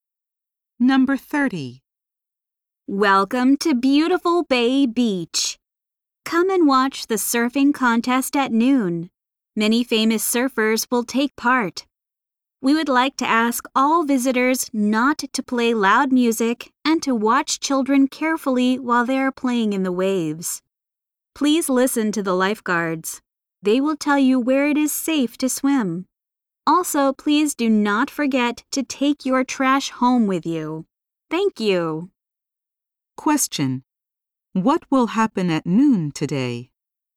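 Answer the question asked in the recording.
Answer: A surfing contest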